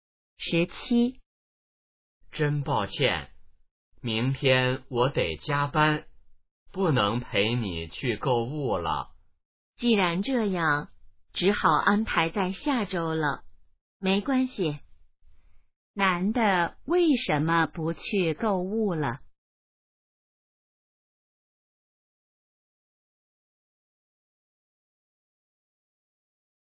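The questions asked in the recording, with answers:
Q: 男的为什么不去购物了?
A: 明天要加班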